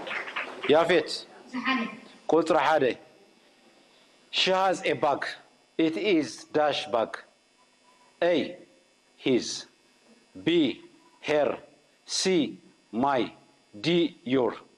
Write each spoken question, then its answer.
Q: It is - bag.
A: Her,